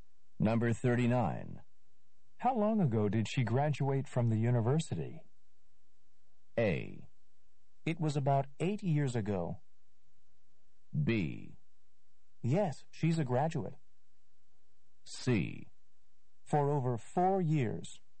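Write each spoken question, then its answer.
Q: How long ago did she graduate from the university?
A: A: It was about 8 years ago.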